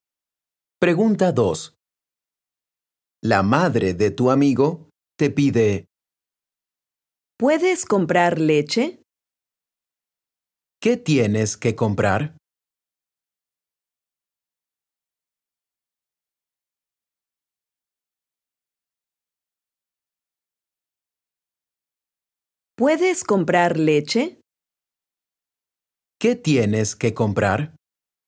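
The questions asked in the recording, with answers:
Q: ¿Qué tienes que comprar?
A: Leche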